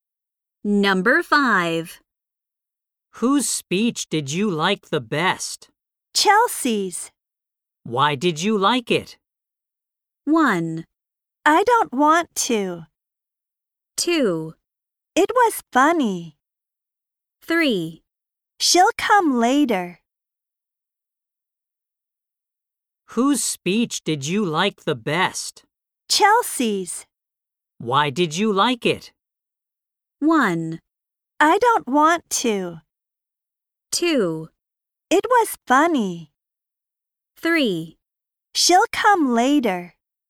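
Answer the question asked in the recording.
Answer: 2: It was funny.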